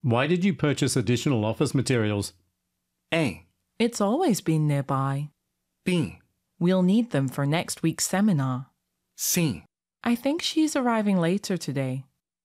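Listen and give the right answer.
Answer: B: We'll need them for next week's seminar.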